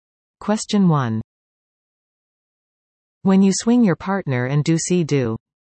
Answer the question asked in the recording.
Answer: The answer is square dancing.